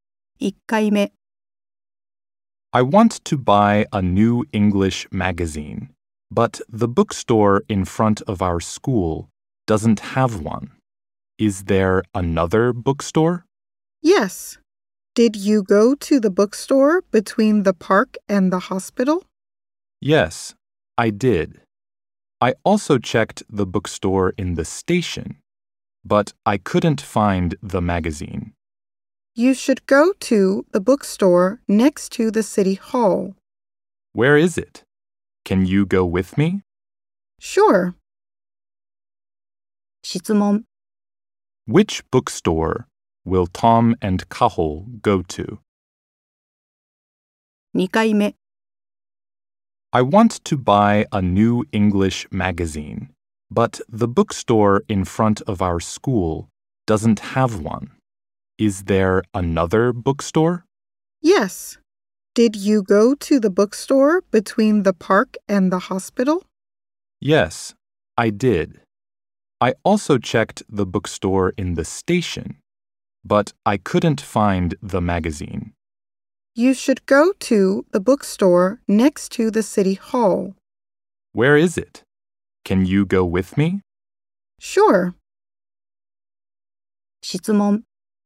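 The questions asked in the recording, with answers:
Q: Which bookstore will Tom and Kaho go to?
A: The bookstore next to the city hall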